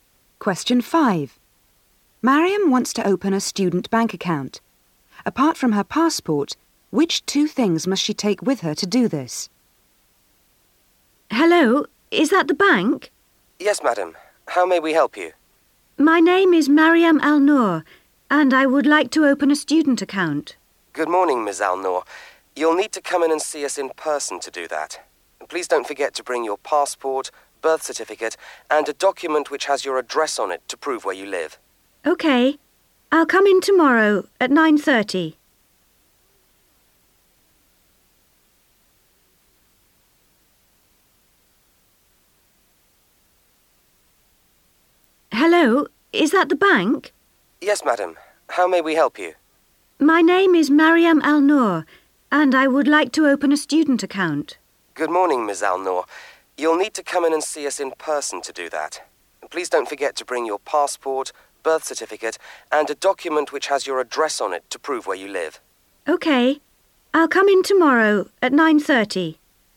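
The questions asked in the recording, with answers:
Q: Apart from her passport, which two things must she take with her to do this?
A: Her birth certificate and a document showing her address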